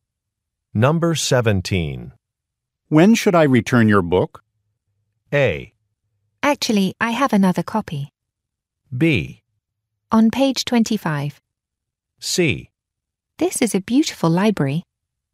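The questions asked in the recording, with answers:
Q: When should I return your book?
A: A: Actually, I have another copy.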